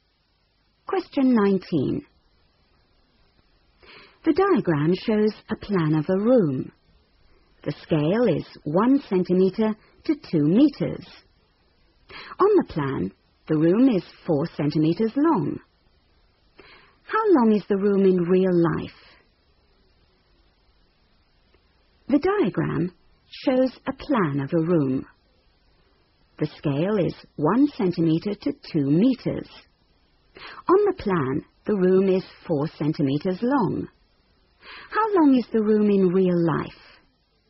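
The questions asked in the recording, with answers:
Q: How long is the room in real life?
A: 8 metres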